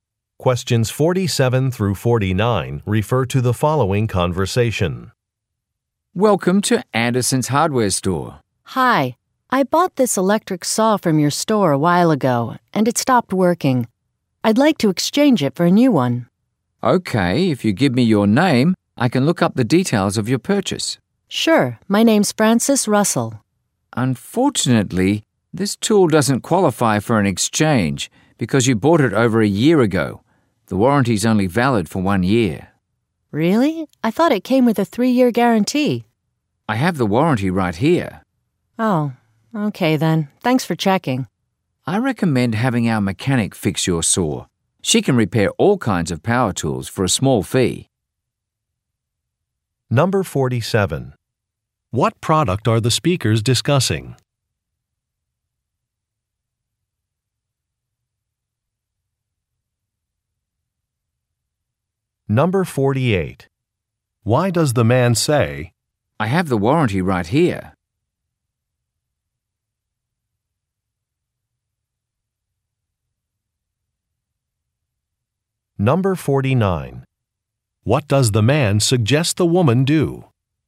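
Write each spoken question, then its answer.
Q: What product are the speakers discussing?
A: An electric saw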